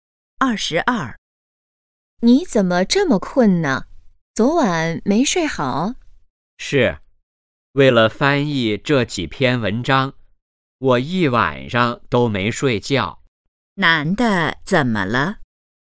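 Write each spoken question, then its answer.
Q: 男的怎么了?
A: 一晚上没睡觉,很困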